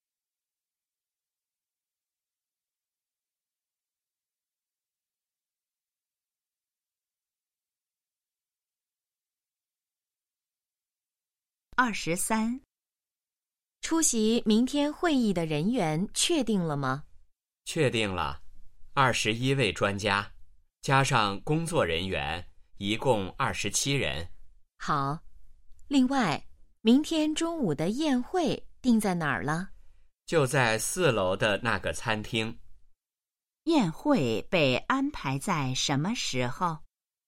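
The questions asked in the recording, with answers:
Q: 宴会被安排在什么时候?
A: 明天中午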